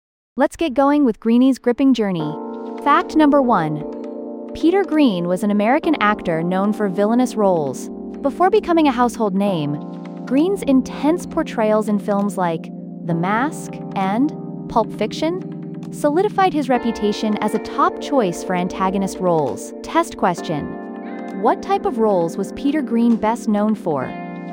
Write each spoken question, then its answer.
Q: What type of roles was Peter Greenay best known for?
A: Correct answer, villainous roles.